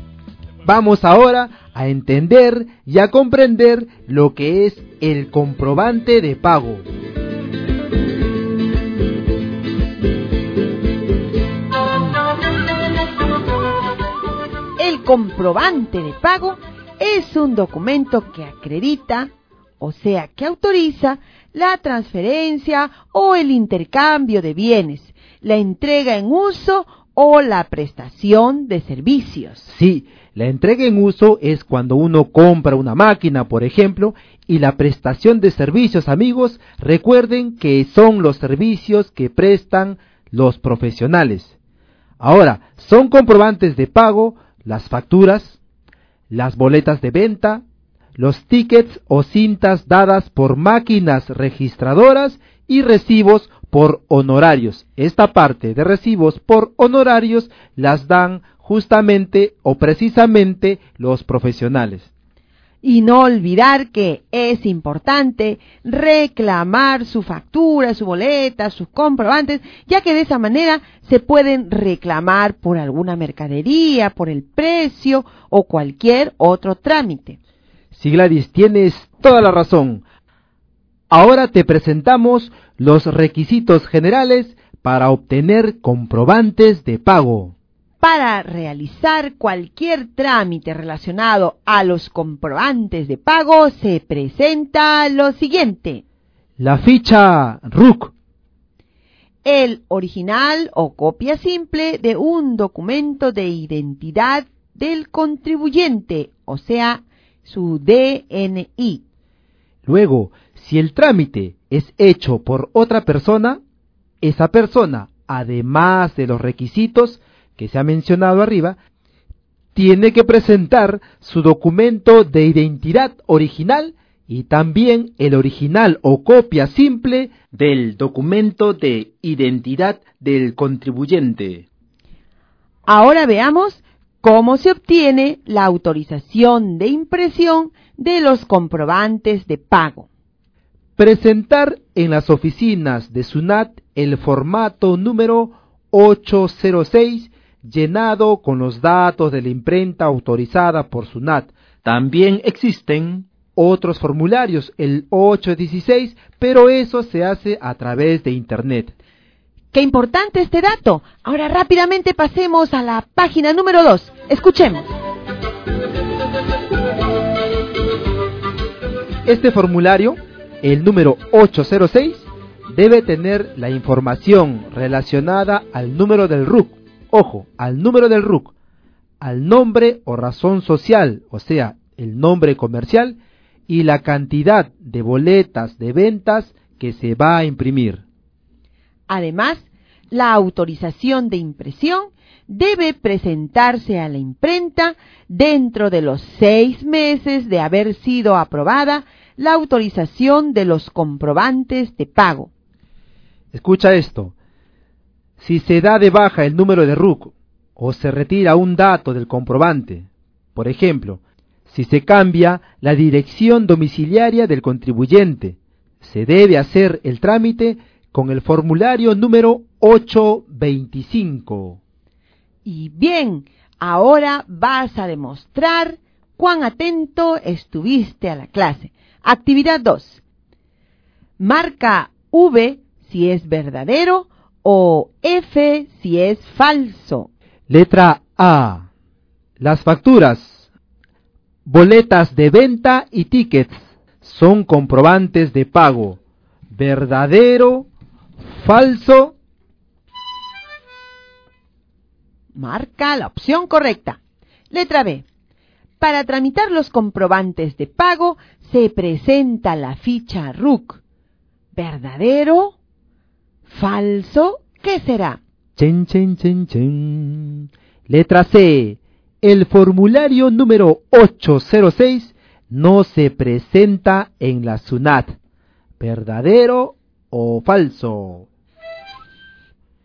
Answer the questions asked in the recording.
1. Por lo tanto, ponemos una X sobre la letra V, porque es verdadero.
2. Como esto es verdadero, ponemos una X sobre la letra V.
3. Esto es falso.